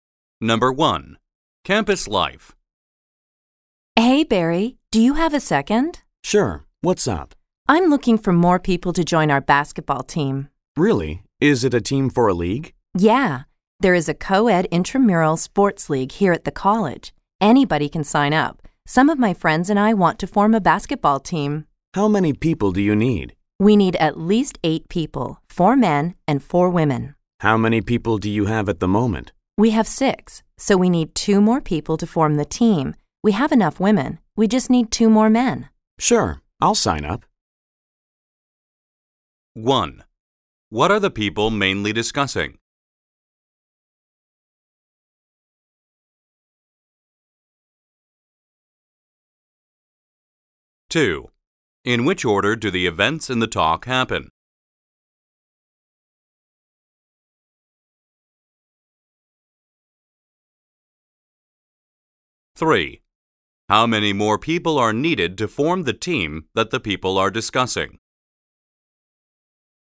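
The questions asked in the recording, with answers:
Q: What are the people mainly discussing?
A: Forming a co-ed intramural basketball team and finding more players

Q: How many more people are needed to form the team that the people are discussing?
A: Two (two more men)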